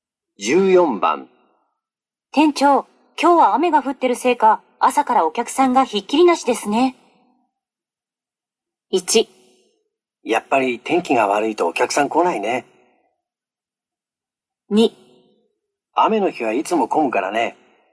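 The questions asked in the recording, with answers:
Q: 店長、今日は雨が降ってるせいか、朝からお客さんがひっきりなしですね。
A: 2: 雨の日はいつも混むからね。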